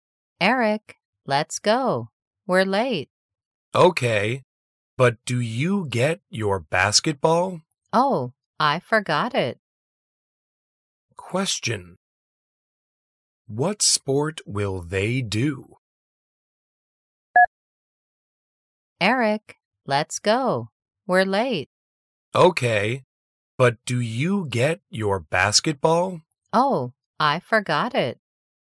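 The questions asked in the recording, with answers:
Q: What sport will they do?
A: Basketball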